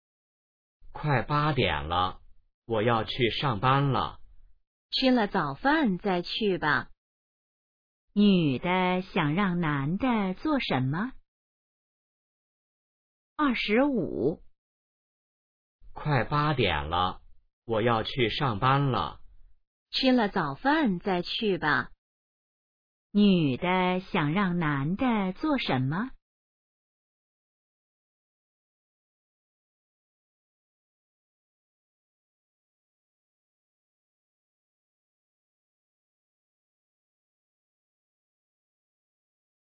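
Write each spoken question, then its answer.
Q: 女的想让男的做什么?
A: 吃早饭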